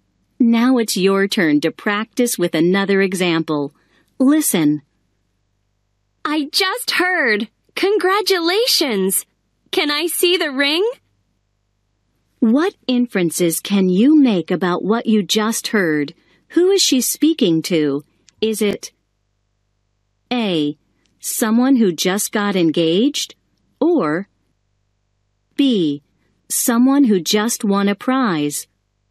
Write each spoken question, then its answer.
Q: Who is she speaking to? Is it A.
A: The correct answer is A.